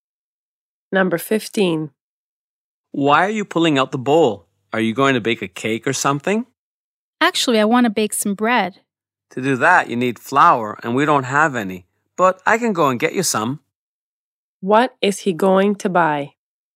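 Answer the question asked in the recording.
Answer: Flour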